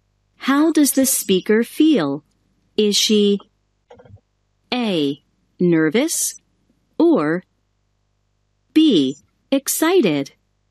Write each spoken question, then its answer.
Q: How does the speaker feel?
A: That's right, B.